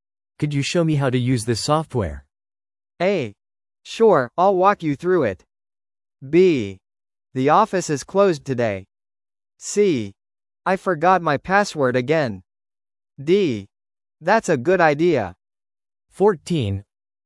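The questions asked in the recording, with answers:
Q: Could you show me how to use this software?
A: A: Sure, I'll walk you through it.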